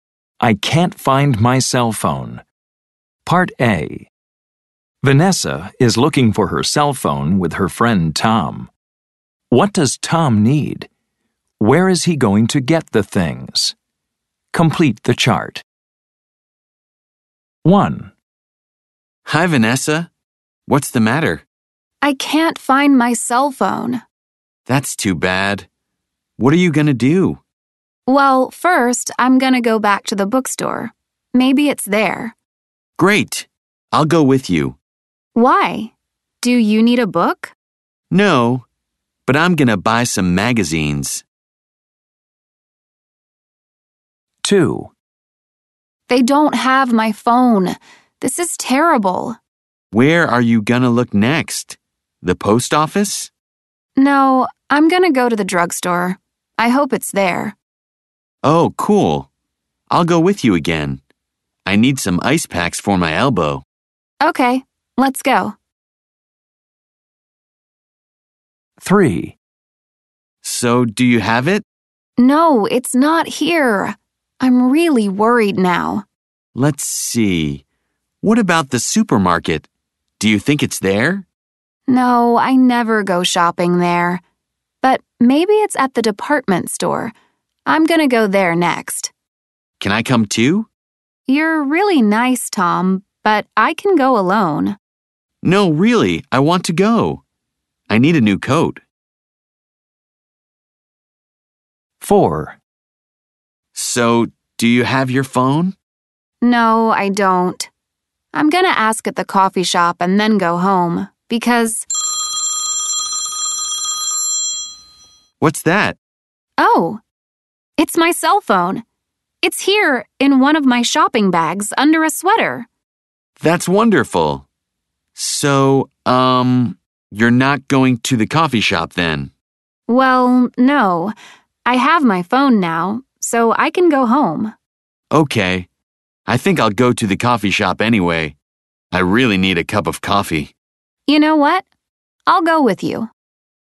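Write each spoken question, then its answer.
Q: What does Tom need? Where is he going to get the things?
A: Magazines, at the bookstore

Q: What does Tom need? Where is he going to get the things?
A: Ice packs, at the drugstore

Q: What does Tom need? Where is he going to get the things?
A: A new coat, at the department store

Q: What does Tom need? Where is he going to get the things?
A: A cup of coffee, at the coffee shop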